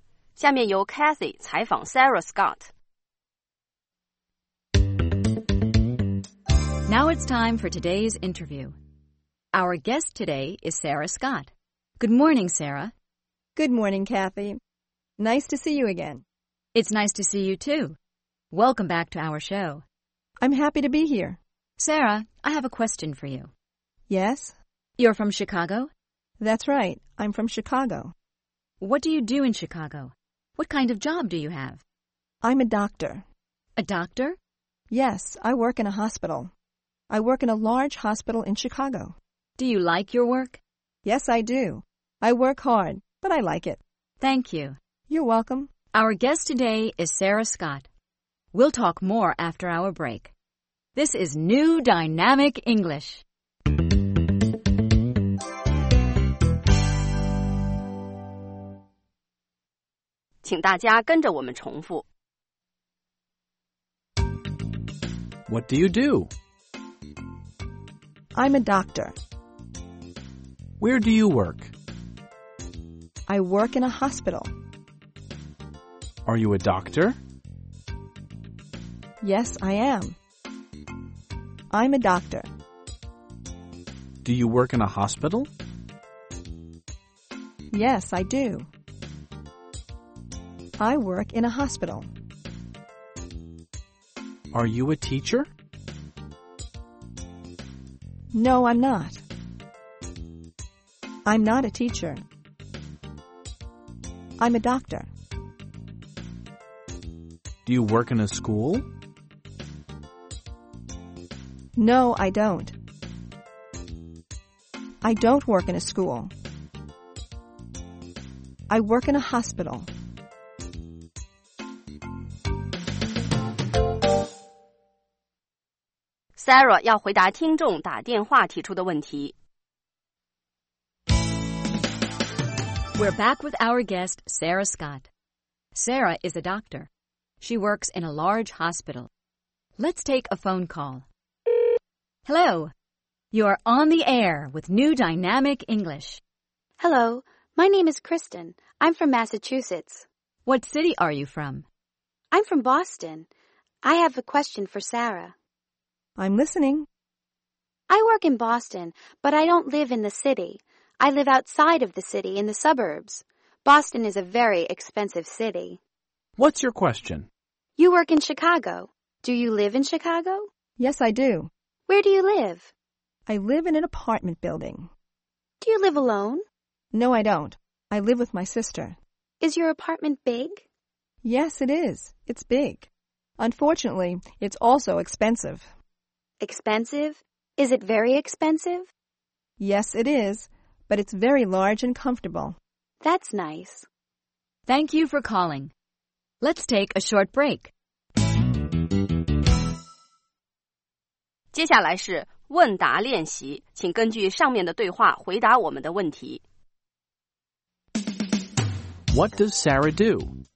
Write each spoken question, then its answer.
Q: What does Sarah do?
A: She's a doctor.